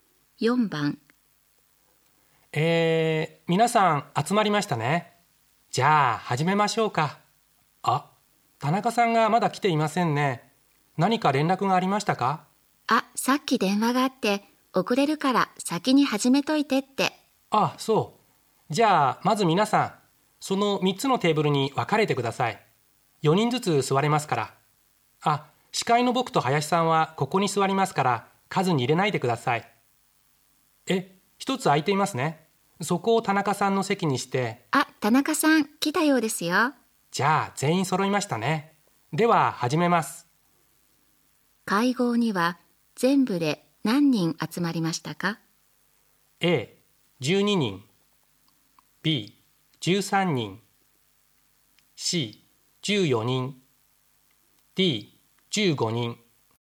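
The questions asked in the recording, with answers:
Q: 会合には、全部で何人集まりましたか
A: C: 14人。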